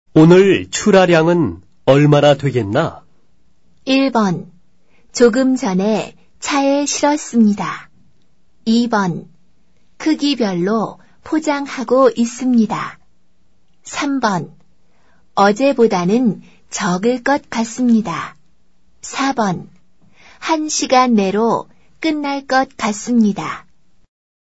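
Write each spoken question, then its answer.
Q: 오늘 출하량은 얼마나 되겠나?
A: 3: 어제보다는 적을 것 같습니다.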